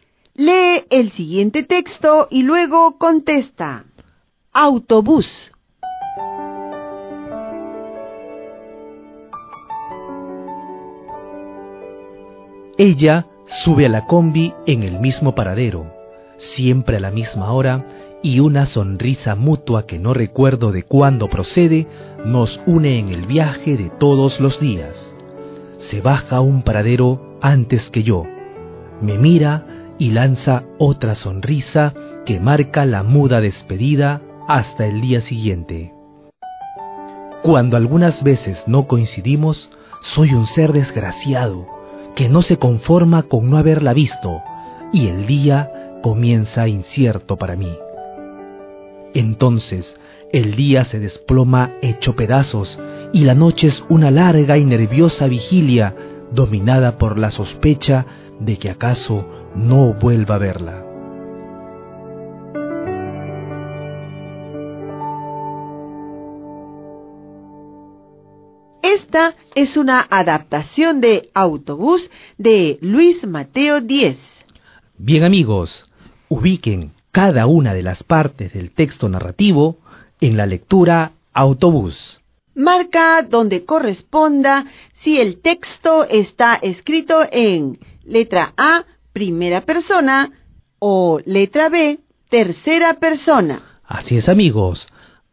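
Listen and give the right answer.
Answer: A: primera persona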